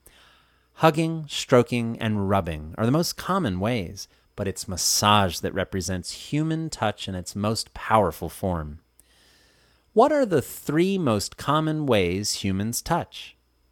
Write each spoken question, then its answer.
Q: What are the three most common ways humans touch?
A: Hugging, stroking, and rubbing are the most common ways.